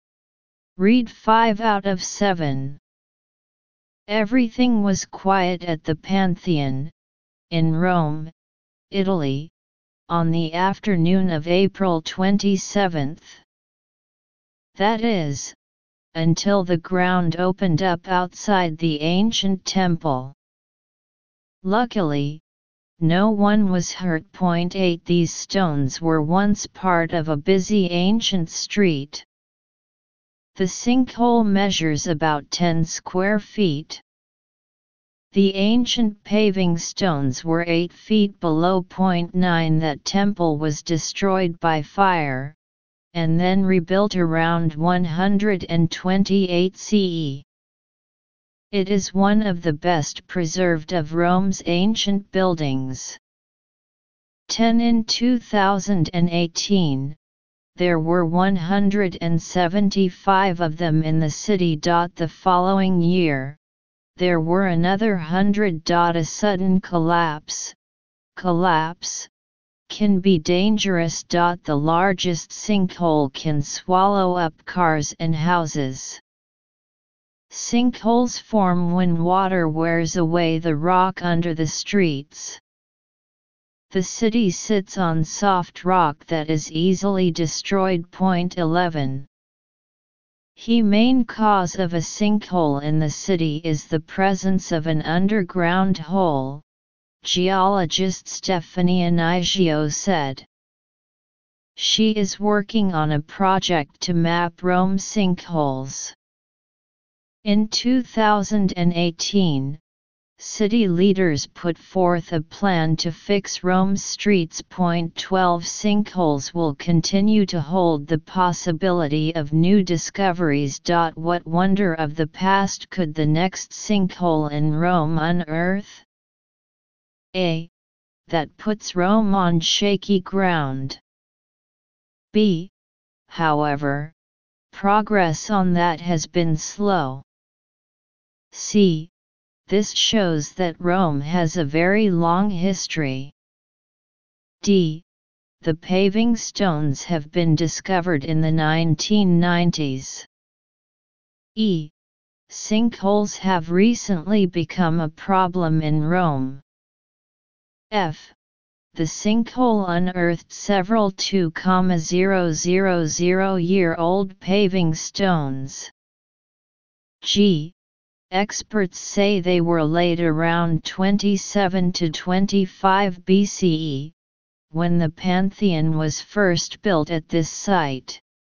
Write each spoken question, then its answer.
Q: 8. These stones were once part of a busy ancient street.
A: 8. Option F.

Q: 9. That temple was destroyed by fire, and then rebuilt around 128 CE.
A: 9. Selecting G.

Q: 10. In 2018, there were 175 of them in the city.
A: 10. Selection E.

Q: 11. The main cause of a sinkhole in the city is the presence of an underground hole, geologist Stephanie Anigio said.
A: 11. Option A.

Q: 12. Sinkholes will continue to hold the possibility of new discoveries.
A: 12. Option B.